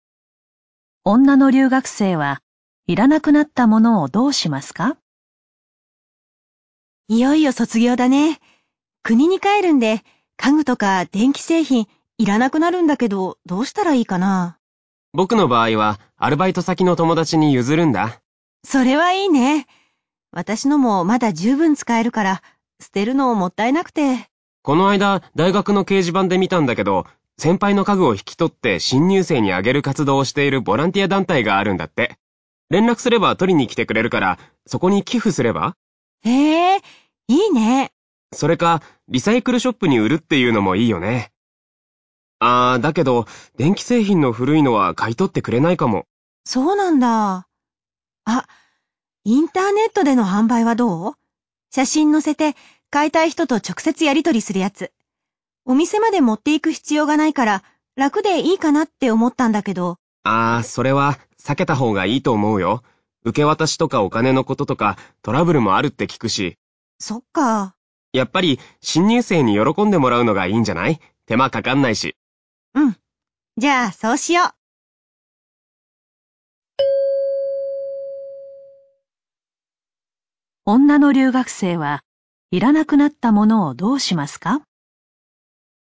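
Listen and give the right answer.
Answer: ボランティア団体に寄付する(新入生にあげる)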